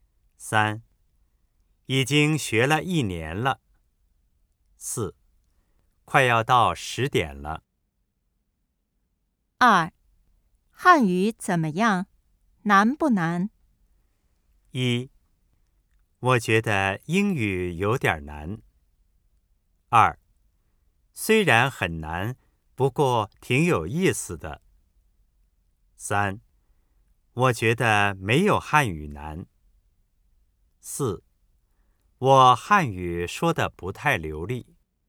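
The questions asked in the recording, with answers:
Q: 汉语怎么样?难不难?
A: 二: 虽然很难,不过挺有意思的。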